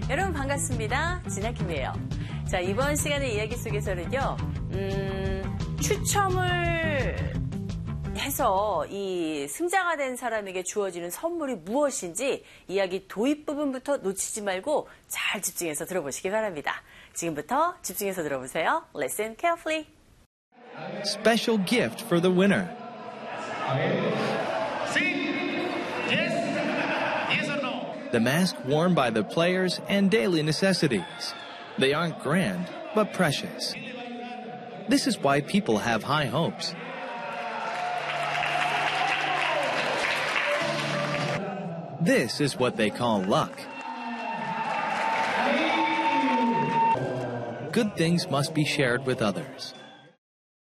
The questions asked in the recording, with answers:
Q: 추첨을 해서 이 승자가 된 사람에게 주어지는 선물이 무엇인지 이야기 도입 부분부터 놓치지 말고 잘 집중해서 들어보시기 바랍니다.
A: 자, 바로 이 선수들이 착용했던 가면과 그리고 생활 필수품이었죠.